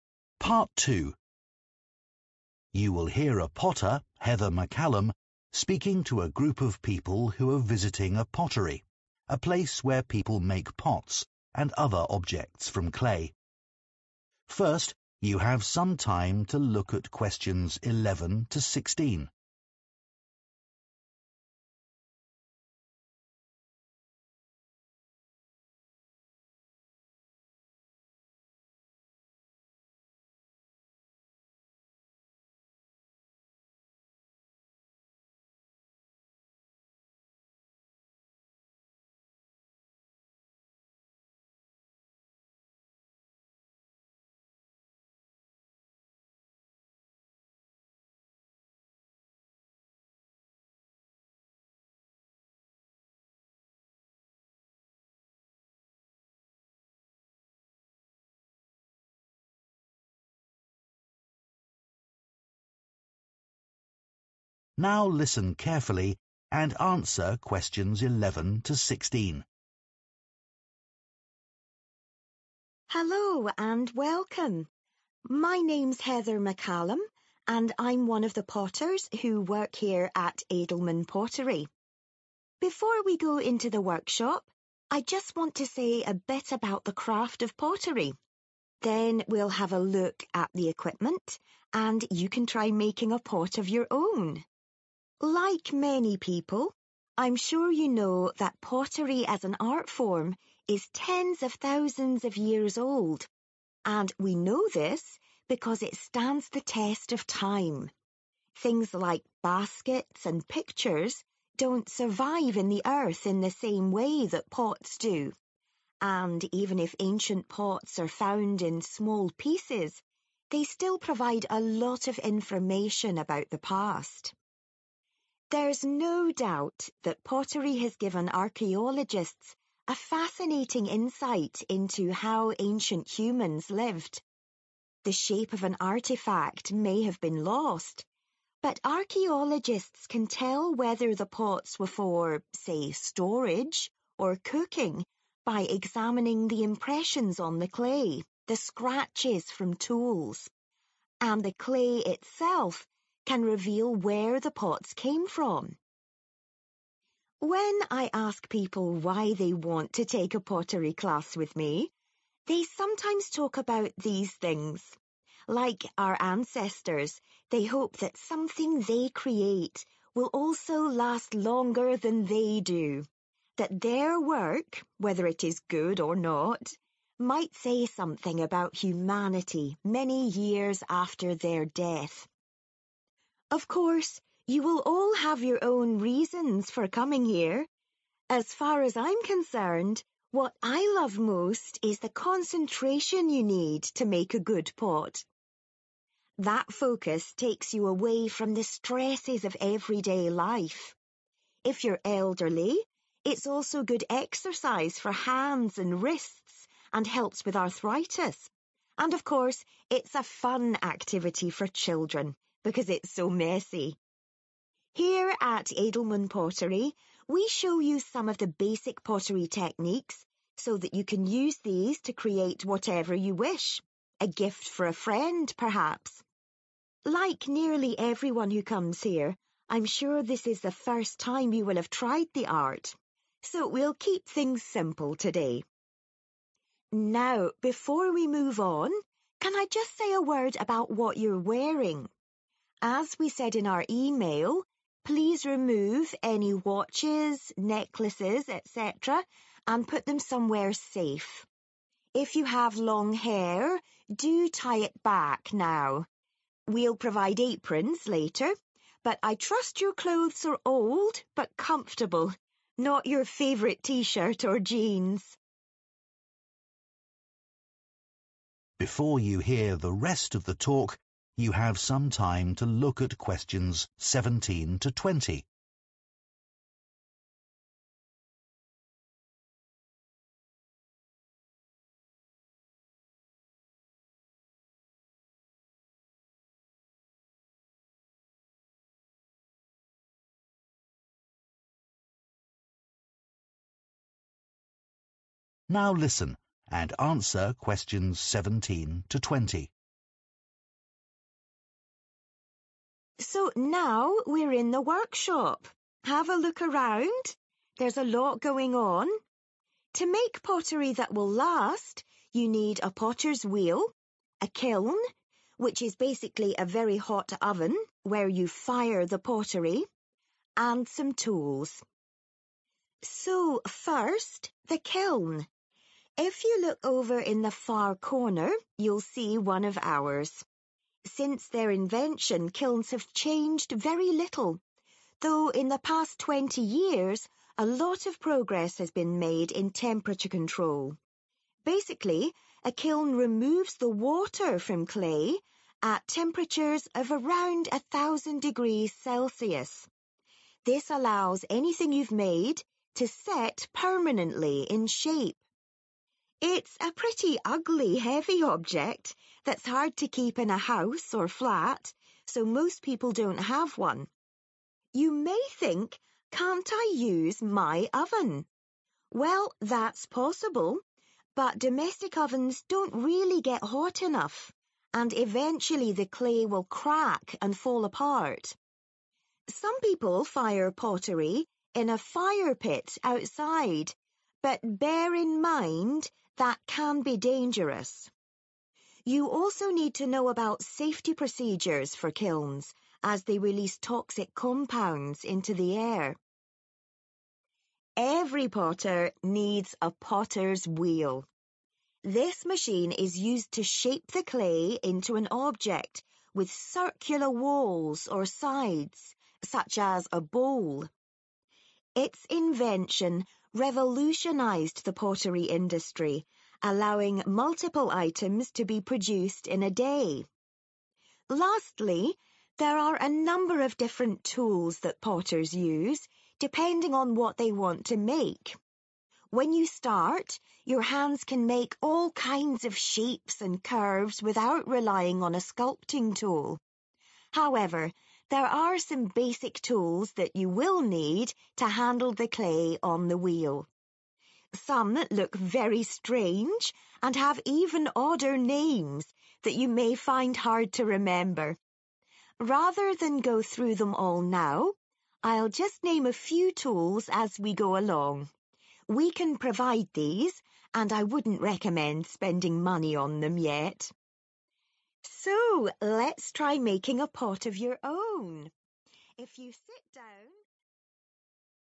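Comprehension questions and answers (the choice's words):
Choose the correct letter, A, B or C.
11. Heather says pottery differs from other art forms because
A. it lasts longer in the ground.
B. it is practised by more people.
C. it can be repaired more easily.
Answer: it lasts longer in the ground.

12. Archaeologists sometimes identify the use of ancient pottery from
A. the clay it was made with.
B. the marks that are on it.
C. the basic shape of it.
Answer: the marks that are on it.

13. Some people join Heather's pottery class because they want to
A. create an item that looks very old.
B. find something that they are good at.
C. make something that will outlive them.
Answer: make something that will outlive them.

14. What does Heather value most about being a potter?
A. its calming effect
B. its messy nature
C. its physical benefits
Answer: its calming effect

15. Most of the visitors to Edelman Pottery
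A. bring friends to join courses.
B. have never made a pot before.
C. try to learn techniques too quickly.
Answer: have never made a pot before.

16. Heather reminds her visitors that they should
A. put on their aprons.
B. change their clothes.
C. take off their jewellery.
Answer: take off their jewellery.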